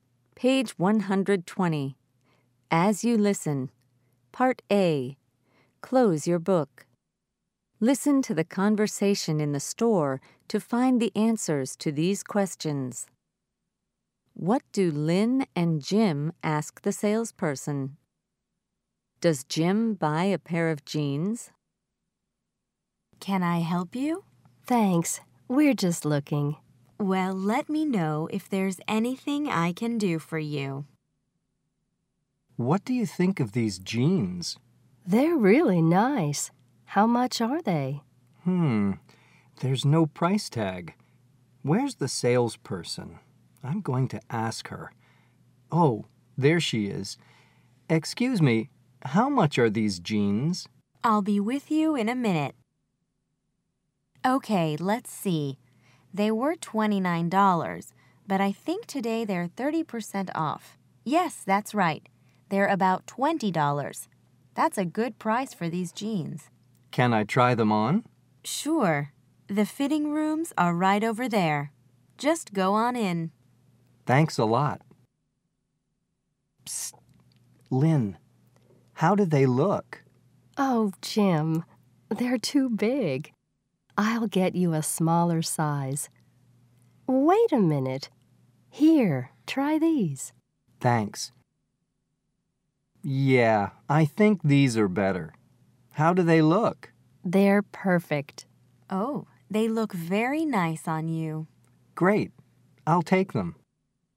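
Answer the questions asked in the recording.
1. How much the jeans are and if Jim can try them on
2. Yes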